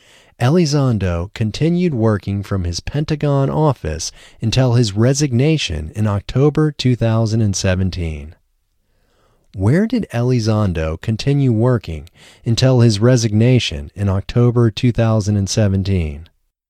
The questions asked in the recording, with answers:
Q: Where did Elizondo continue working until his resignation in October 2017?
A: Elizondo continued working from his Pentagon office until his resignation in October 2017.